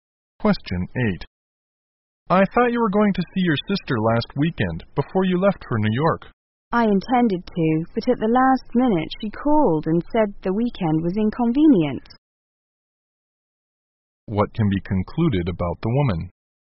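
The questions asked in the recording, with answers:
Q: What can be concluded about the woman?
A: She did not see her sister last weekend.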